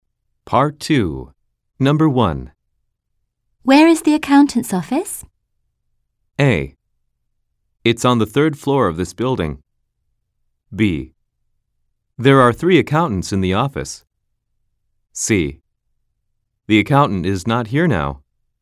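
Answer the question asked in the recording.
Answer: A: It's on the third floor of this building.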